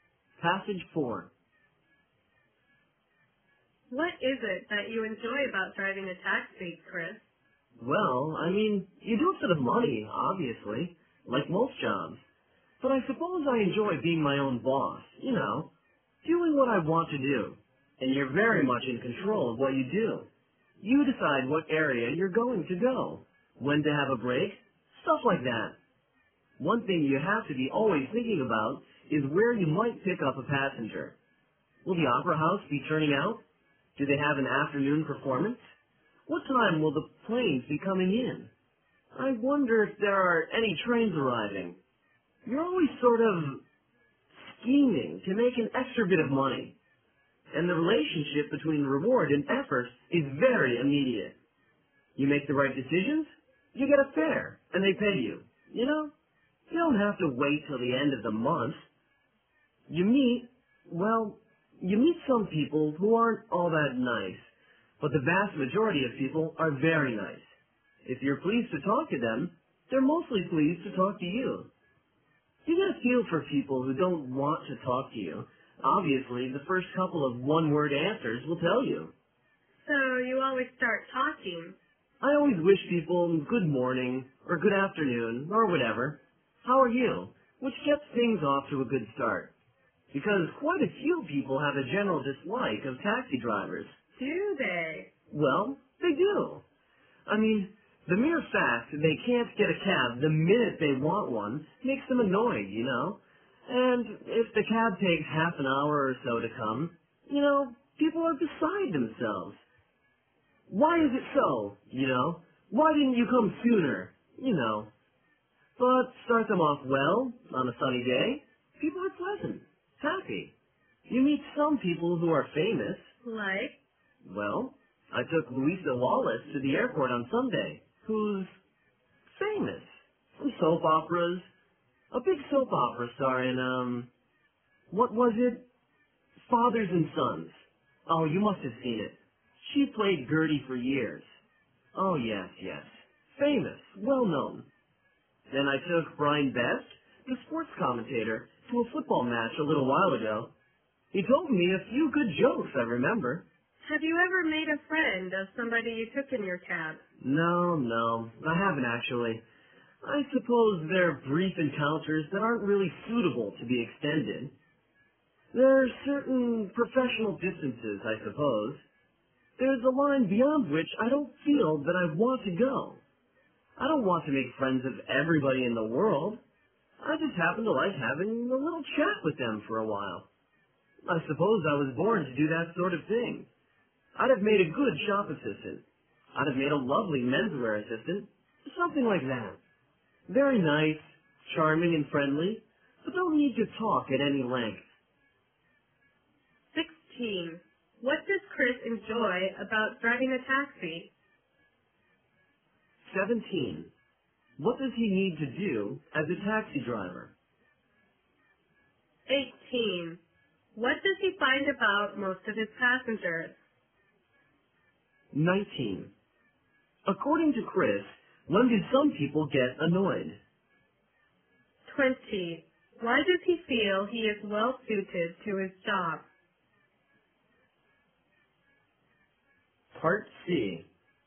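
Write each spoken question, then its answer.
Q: What does Chris enjoy about driving a taxi?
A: Being his own boss and in control of what he does

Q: What does he need to do as a taxi driver?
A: Always think about where he might pick up passengers

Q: What does he find about most of his passengers?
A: The vast majority are very nice

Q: According to Chris, when do some people get annoyed?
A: When they can't get a cab the minute they want one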